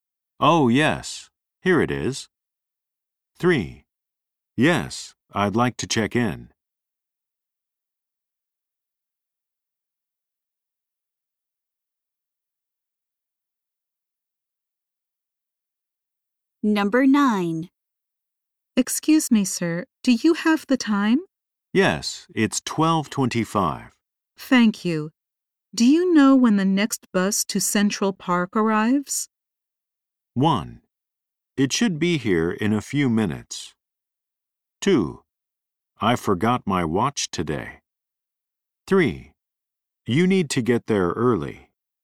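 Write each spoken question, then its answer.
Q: Thank you. Do you know when the next bus to Central Park arrives?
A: 1: It should be here in a few minutes.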